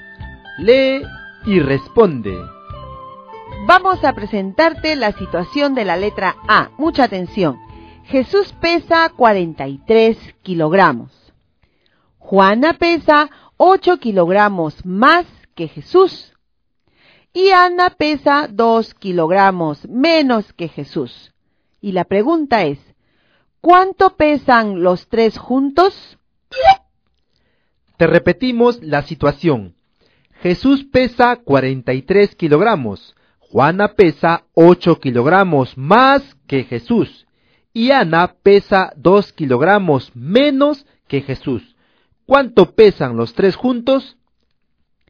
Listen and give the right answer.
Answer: en la letra A, la respuesta es 135 kilogramos.